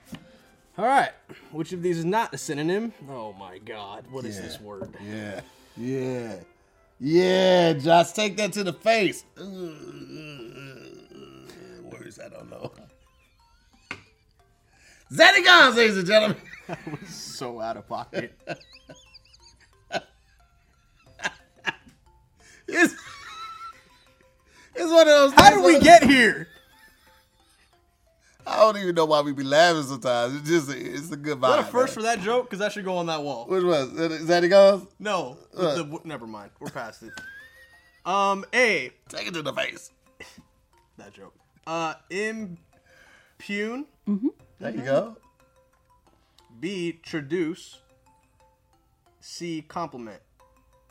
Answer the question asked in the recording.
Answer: Correct.